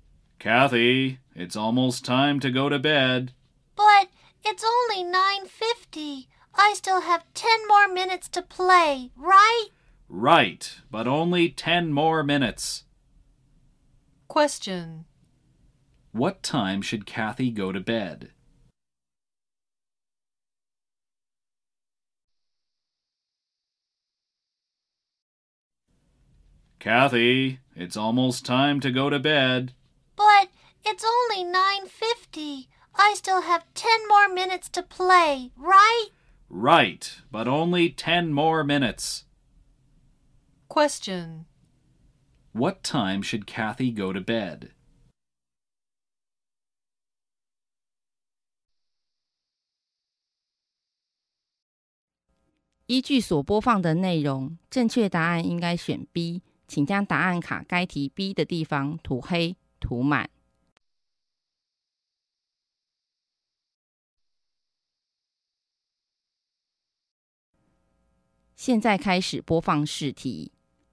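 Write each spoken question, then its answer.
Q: What time should Kathy go to bed?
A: At 10:00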